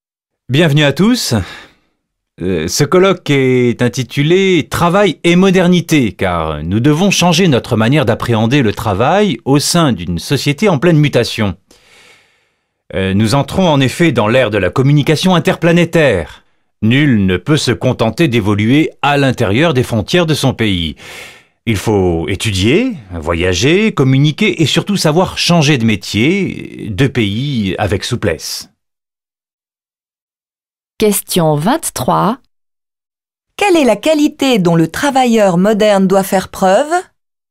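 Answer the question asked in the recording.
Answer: La souplesse (savoir changer de métier, de pays)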